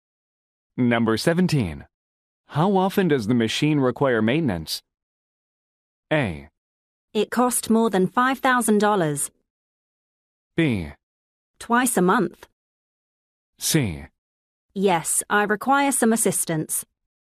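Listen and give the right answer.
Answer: B: Twice a month.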